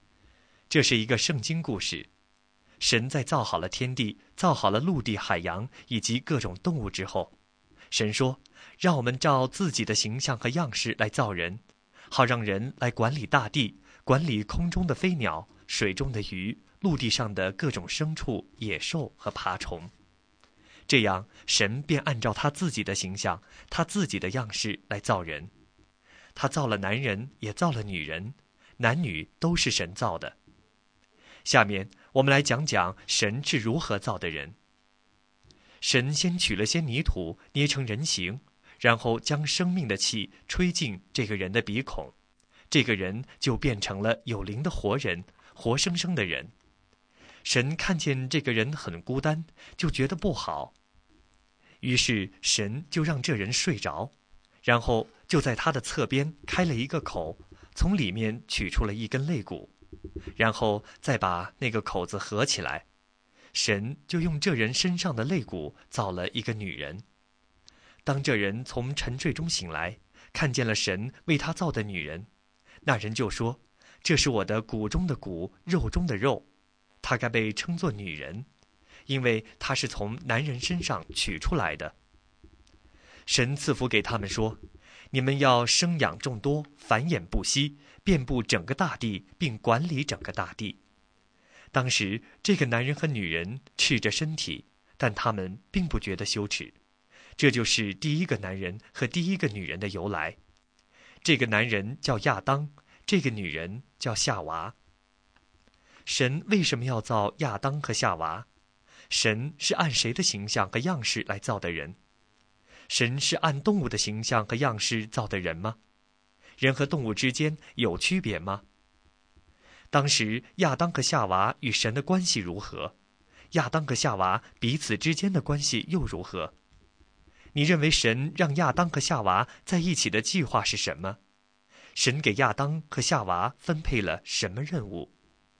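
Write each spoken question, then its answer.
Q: 神是按谁的形象和样式来造的人?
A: 按神自己的形象和样式

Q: 神是按动物的形象和样式造的人吗?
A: 不是,是按神自己的形象

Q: 神给亚当和夏娃分配了什么任务?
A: 生养众多,遍布并管理整个大地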